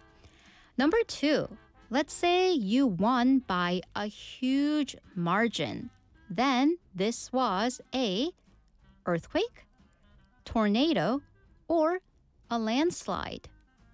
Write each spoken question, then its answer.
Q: Then this was a earthquake, tornado, or a landslide.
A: 자, 압승은 영어로 landslide라고 했었죠.